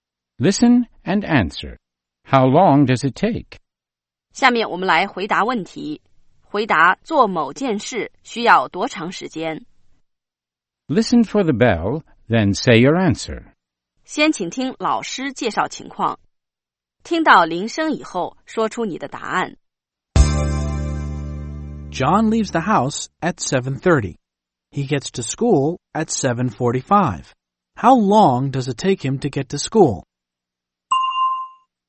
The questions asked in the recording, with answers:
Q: How long does it take him to get to school?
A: It takes him 15 minutes. It takes him 15 minutes to get to school.